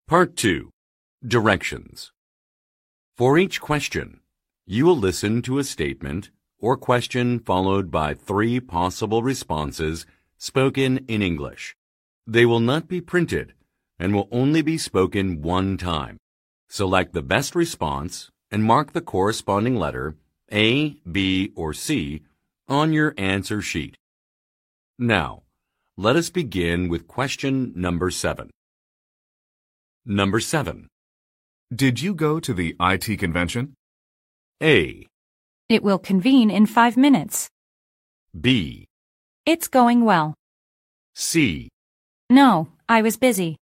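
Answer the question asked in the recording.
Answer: No, I was busy.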